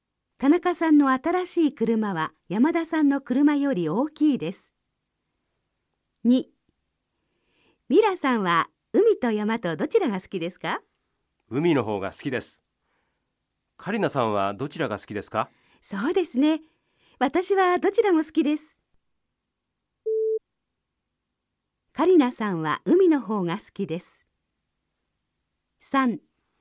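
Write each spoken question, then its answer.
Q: カリナさんは海の方が好きです。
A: ×(カリナさんはどちらも好きです)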